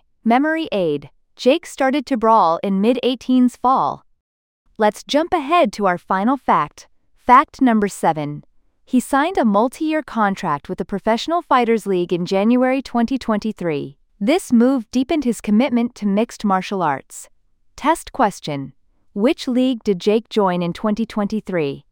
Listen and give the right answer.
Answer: Professional Fighters League.